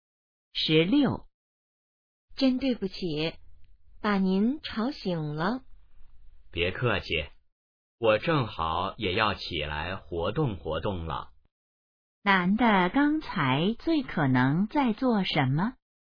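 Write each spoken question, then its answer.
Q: 男的刚才最可能在做什么?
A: 睡觉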